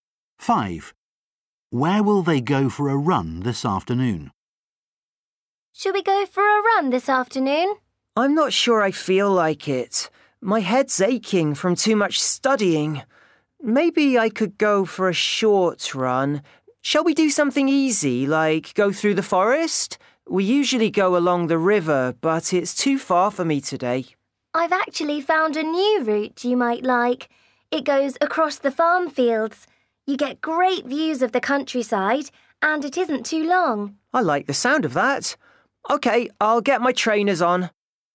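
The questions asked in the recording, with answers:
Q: Where will they go for a run this afternoon?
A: Across the farm fields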